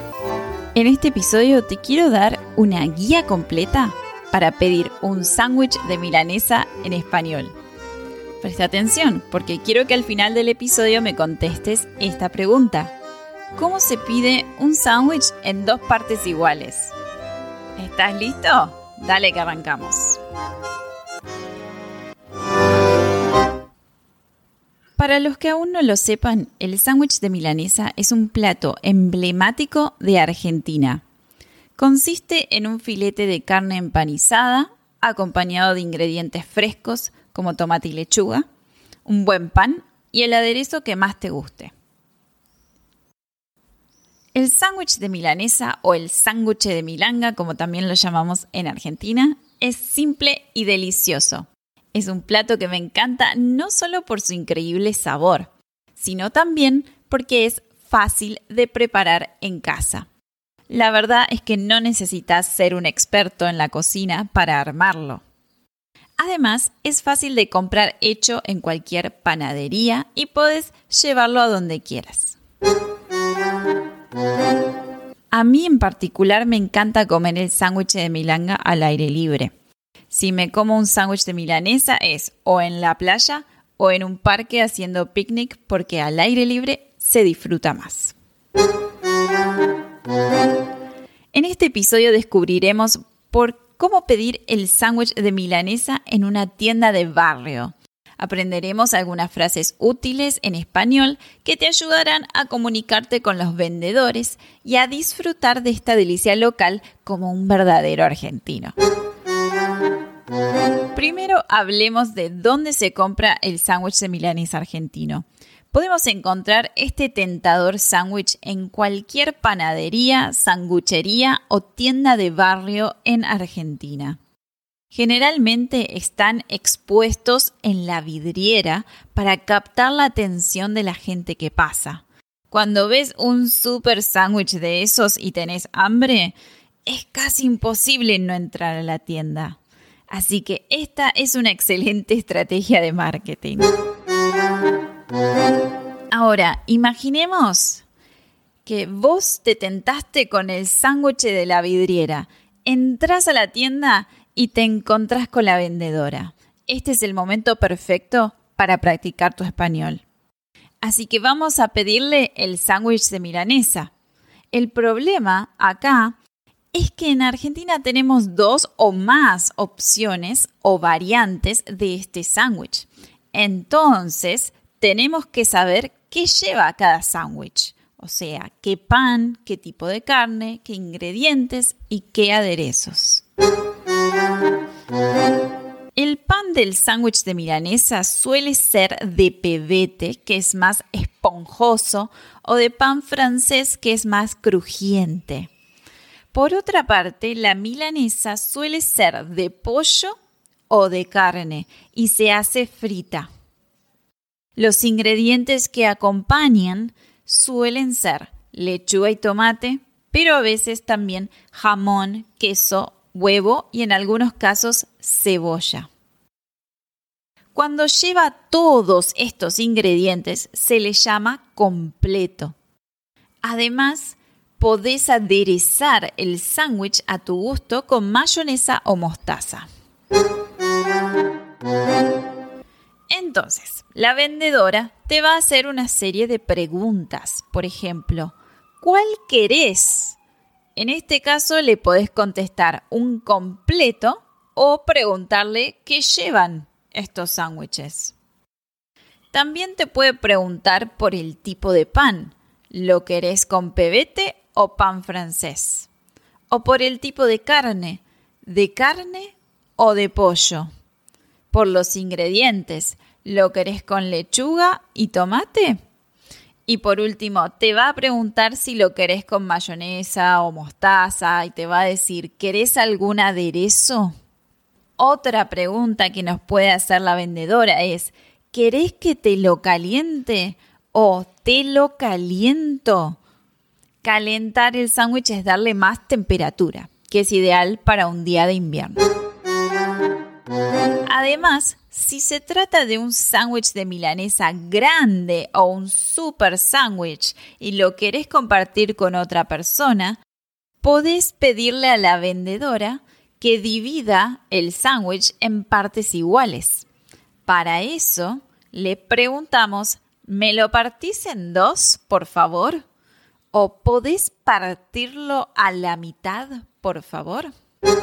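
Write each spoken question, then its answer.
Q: ¿Cómo se pide un sándwich en dos partes iguales?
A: ¿Me lo partís en dos, por favor? / ¿Podés partirlo a la mitad, por favor?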